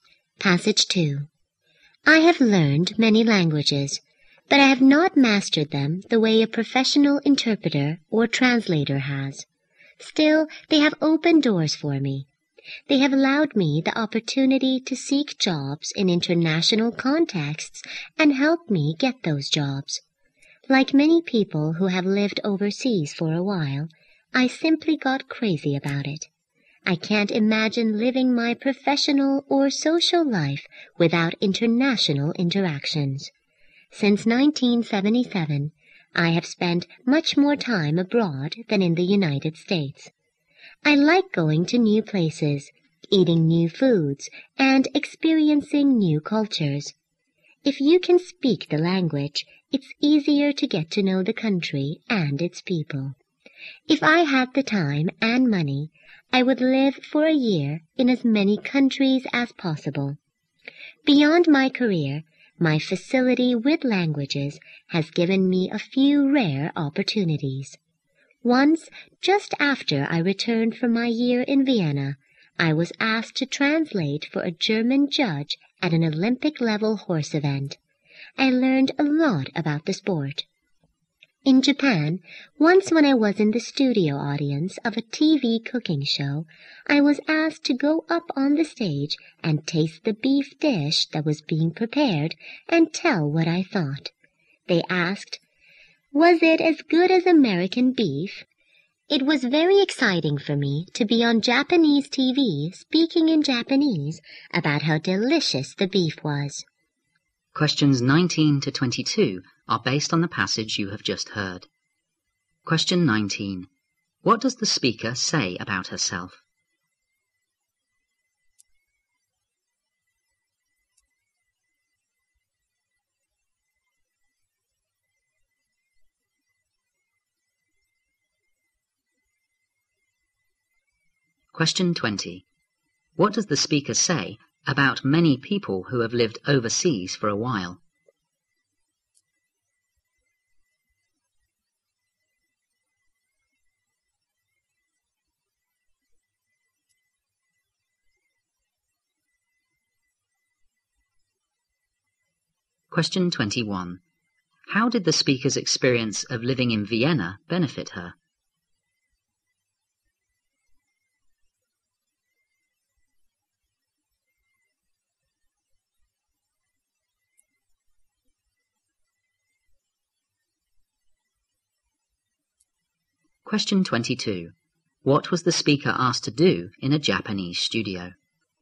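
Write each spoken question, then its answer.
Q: What does the speaker say about herself?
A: She has learned many languages but not mastered them like a professional interpreter.

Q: What does the speaker say about many people who have lived overseas for a while?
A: They get crazy about living abroad.

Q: How did the speaker's experience of living in Vienna benefit her?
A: She was asked to translate for a German judge at an Olympic-level horse event.

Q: What was the speaker asked to do in a Japanese studio?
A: Taste a beef dish and say what she thought of it.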